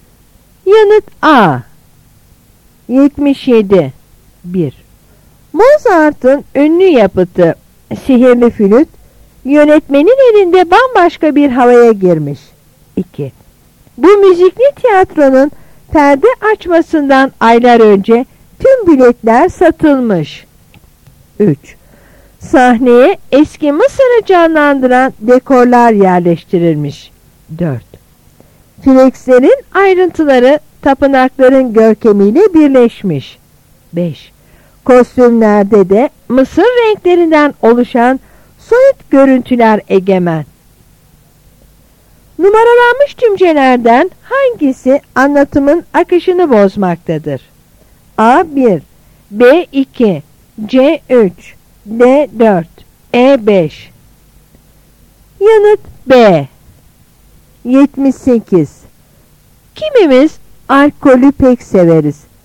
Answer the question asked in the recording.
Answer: Yanıt B.